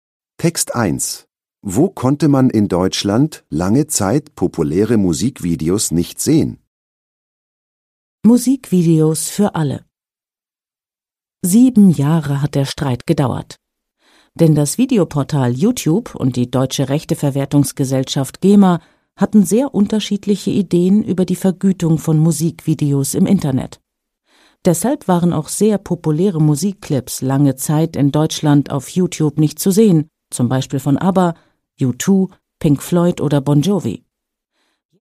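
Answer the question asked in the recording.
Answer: Auf YouTube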